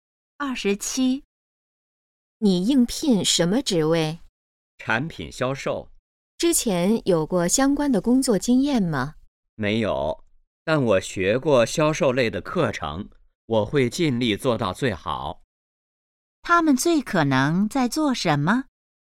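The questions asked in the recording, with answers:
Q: 他们最可能在做什么?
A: 面试(应聘)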